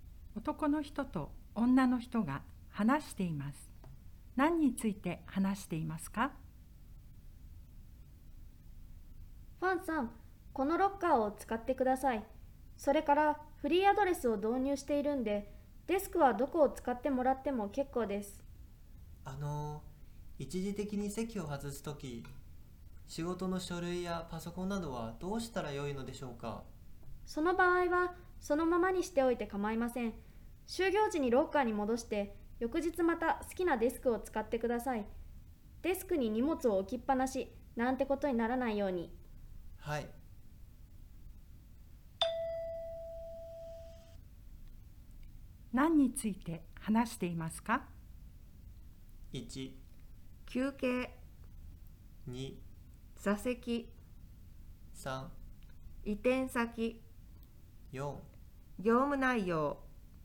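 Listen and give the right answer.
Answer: 2: 座席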